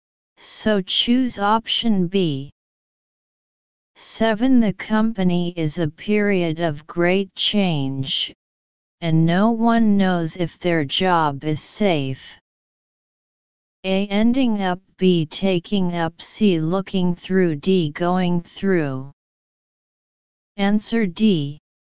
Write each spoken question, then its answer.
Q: The company is a period of great change, and no one knows if their job is safe.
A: Answer D.